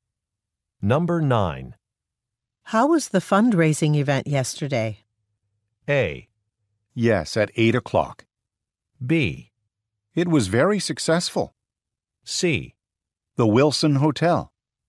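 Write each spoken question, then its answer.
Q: How was the fundraising event yesterday?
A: B: It was very successful.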